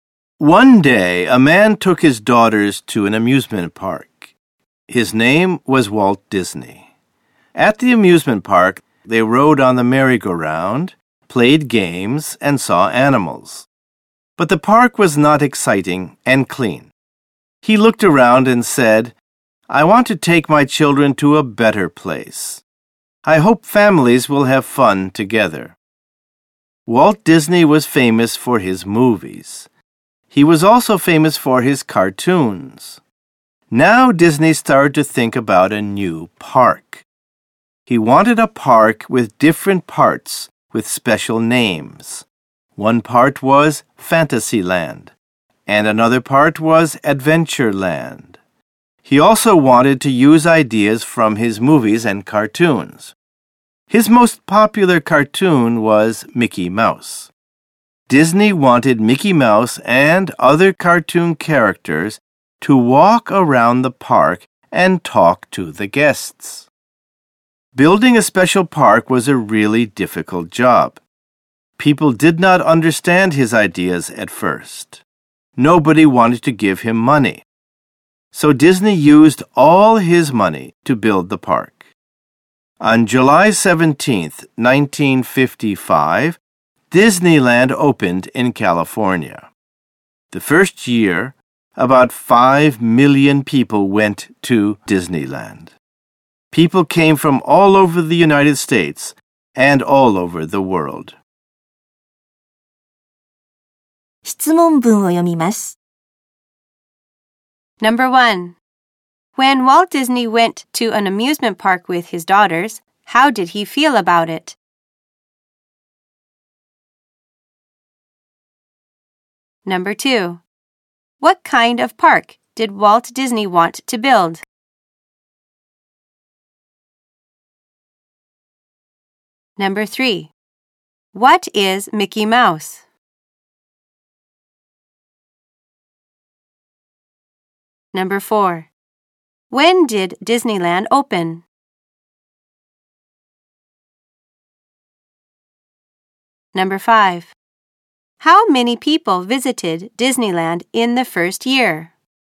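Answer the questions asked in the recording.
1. He felt it was not exciting or clean and wanted a better place for his children.
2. A park with different parts with special names, using ideas from his movies and cartoons, where families have fun together.
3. Walt Disney's most popular cartoon character.
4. On July 17, 1955.
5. About 5 million people.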